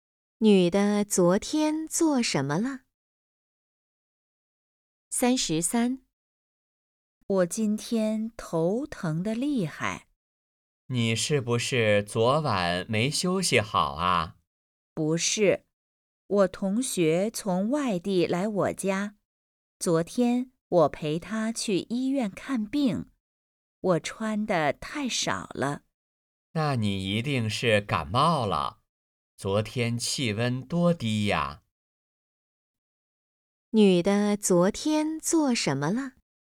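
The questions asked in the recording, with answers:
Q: 女的昨天做什么了?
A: 陪同学去医院看病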